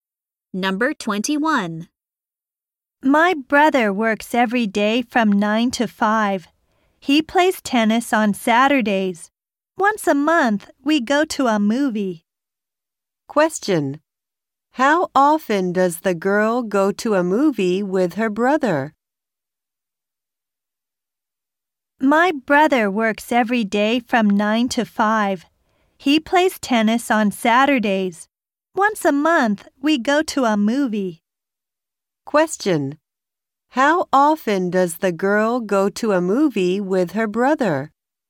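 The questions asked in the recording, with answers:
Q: How often does the girl go to a movie with her brother?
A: Once a month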